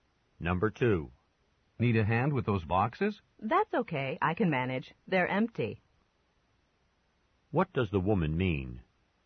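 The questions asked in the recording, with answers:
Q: What does the woman mean?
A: She doesn't need help because the boxes are empty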